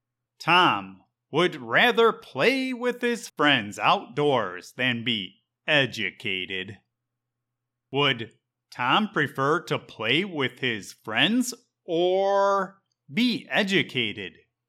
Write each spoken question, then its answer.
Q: Would Tom prefer to play with his friends or be educated?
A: Tom would prefer to play with his friends.